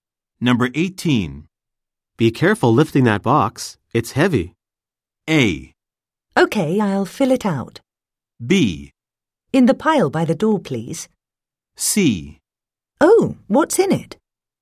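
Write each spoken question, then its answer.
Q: Be careful lifting that box.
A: C: Oh, what's in it?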